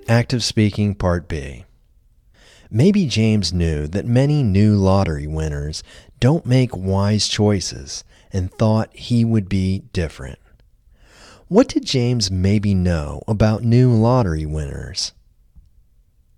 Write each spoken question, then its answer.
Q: What did James maybe know about new lottery winners?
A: Maybe James knew that many new lottery winners don't make wise choices.